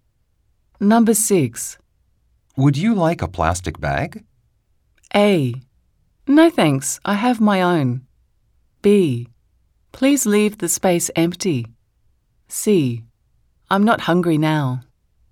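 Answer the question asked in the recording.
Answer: A: No thanks, I have my own.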